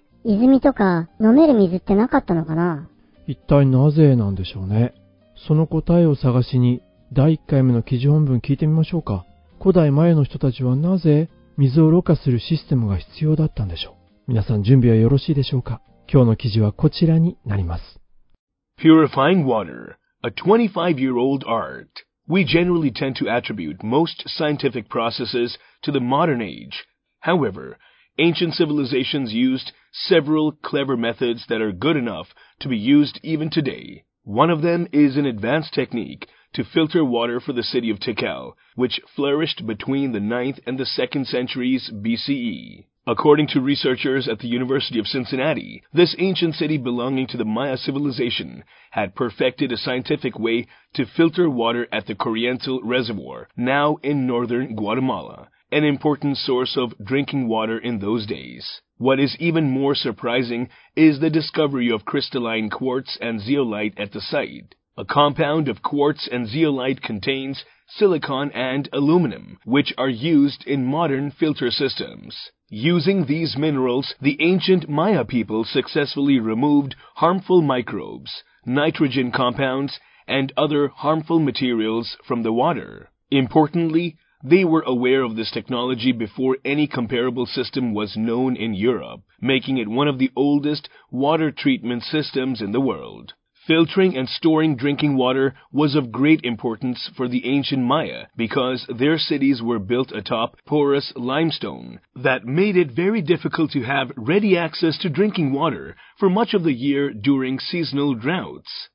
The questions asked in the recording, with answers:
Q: 古代前の人たちはなぜ水をろ過するシステムが必要だった んでしょう。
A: because their cities were built atop porous limestone.